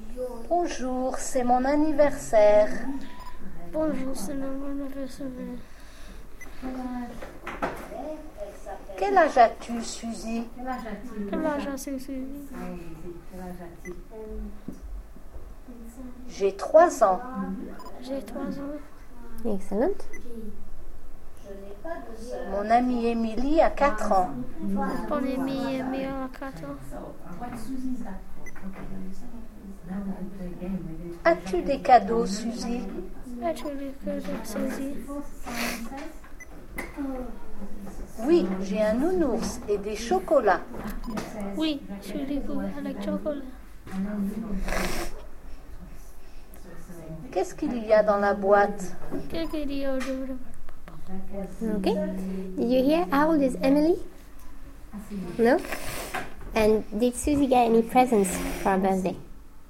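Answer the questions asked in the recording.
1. 4 years old
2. Yes, a teddy bear and chocolates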